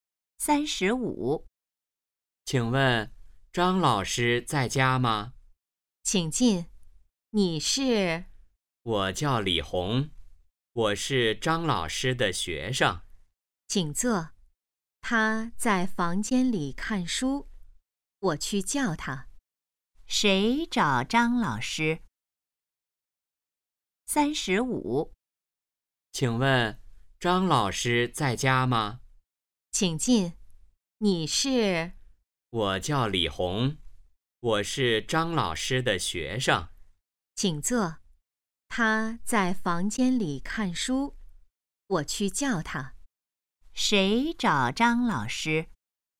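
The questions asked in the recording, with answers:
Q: 谁找张老师?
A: 李红(张老师的学生)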